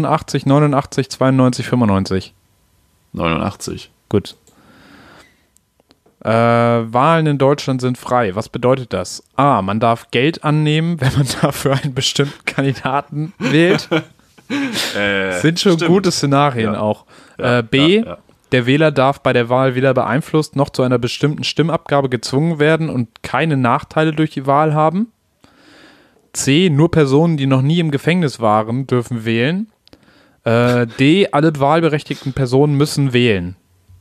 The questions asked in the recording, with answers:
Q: Was bedeutet das?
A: Ja, B.